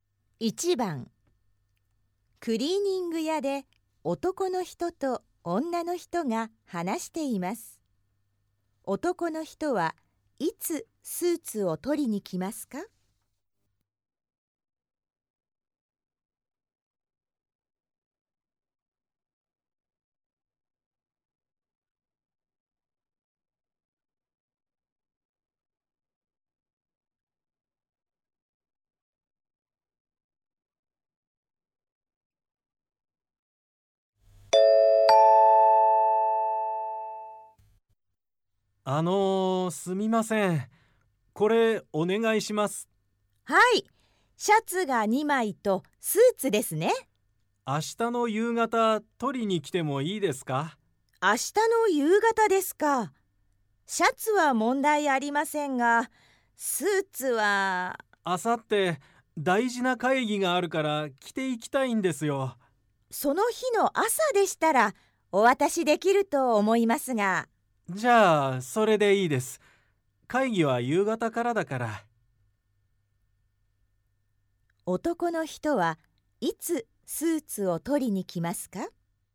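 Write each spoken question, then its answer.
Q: 男の人はいつスーツを取りに来ますか?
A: 明後日の朝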